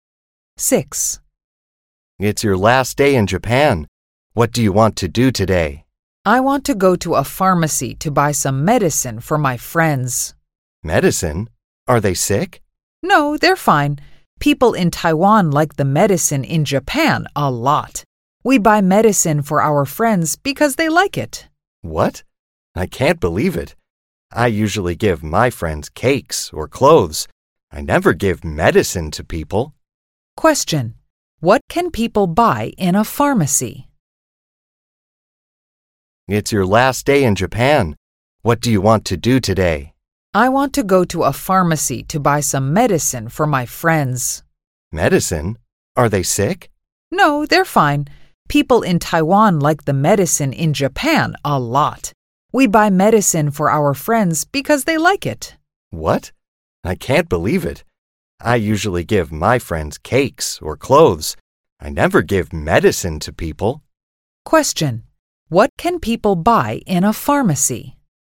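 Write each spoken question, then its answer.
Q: What can people buy in a pharmacy?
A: Medicine.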